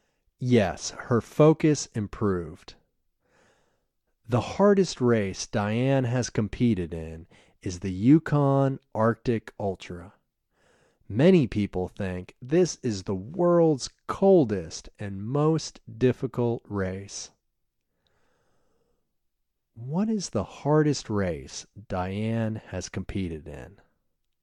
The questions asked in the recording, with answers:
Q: What is the hardest race Diane has competed in?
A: The hardest race Diane has competed in is the Yukon Arctic Ultra.